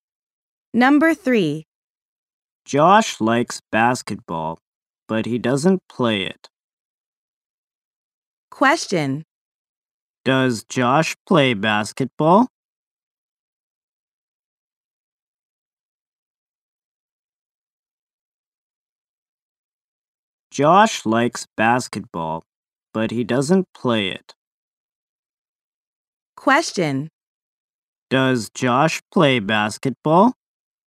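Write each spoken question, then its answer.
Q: Does Josh play basketball?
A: No, he doesn't.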